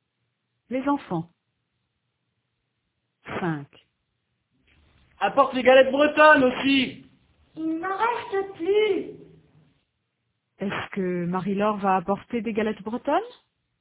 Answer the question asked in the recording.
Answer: Non, il n'en reste plus.